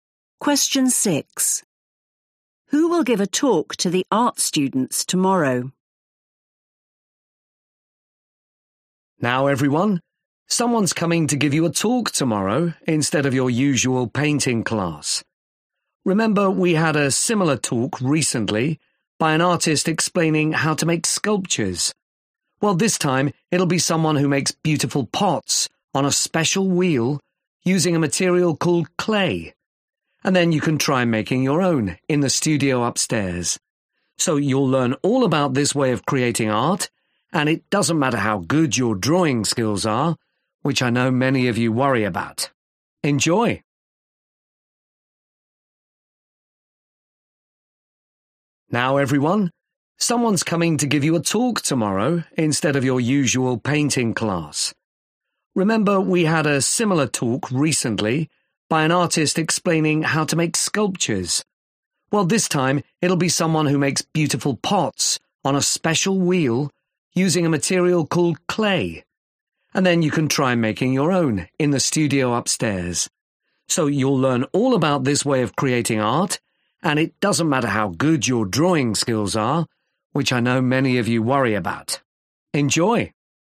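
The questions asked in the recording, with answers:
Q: Who will give a talk to the art students tomorrow?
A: someone who makes pots from clay (a potter)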